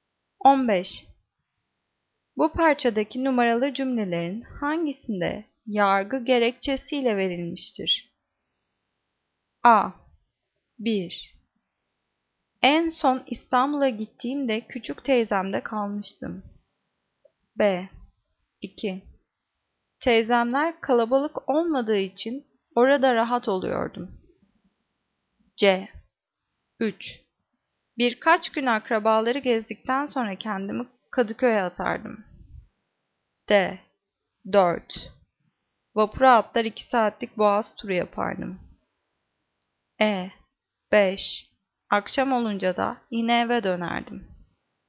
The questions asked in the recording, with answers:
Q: Bu parçadaki numaralı cümlelerin hangisinde yargı gerekçesiyle verilmiştir?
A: Cevap B. 2. Teyzemler kalabalık olmadığı için orada rahat oluyordum.